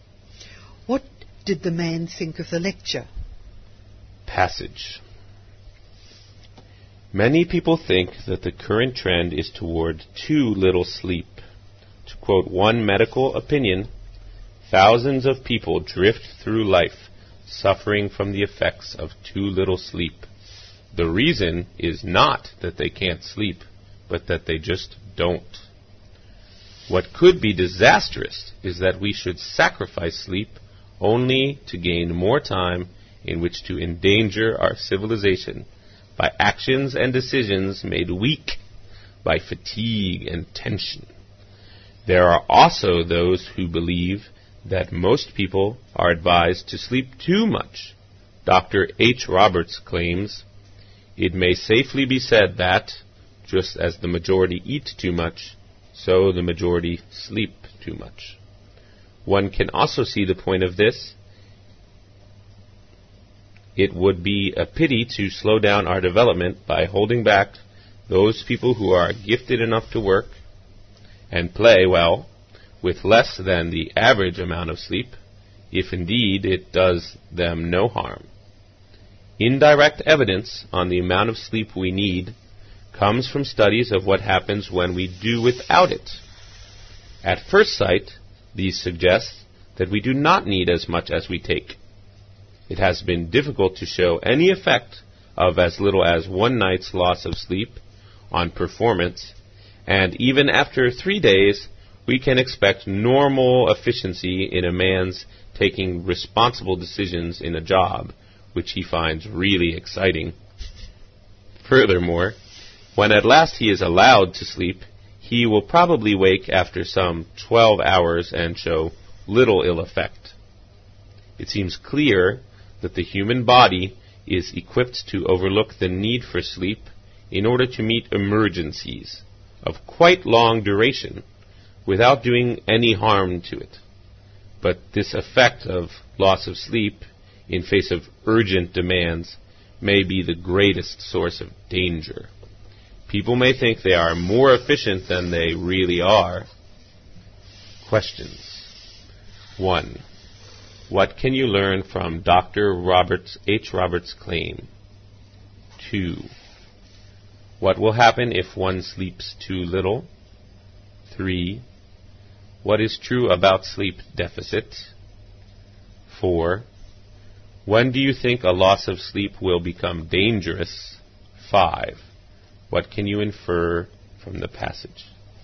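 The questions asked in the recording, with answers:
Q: What can you learn from Dr. Roberts, H. Roberts' claim?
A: Most people sleep too much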